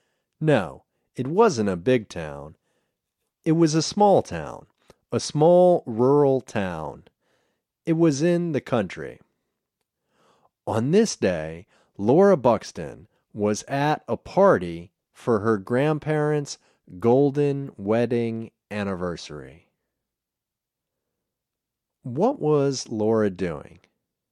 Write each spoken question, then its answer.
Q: What was Laura doing?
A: She was at a party.